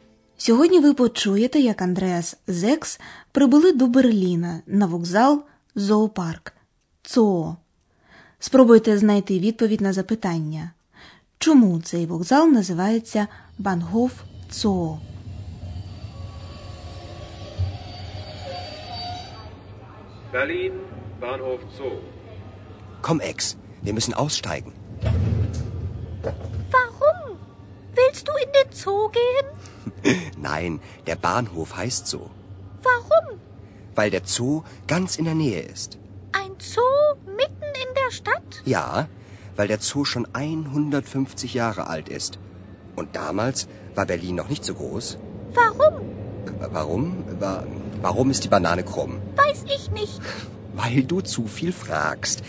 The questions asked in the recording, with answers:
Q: Чому цей вокзал називається Бангоф Цо?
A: Вокзал має назву зоопарк, тому що він розташований поблизу зоопарку.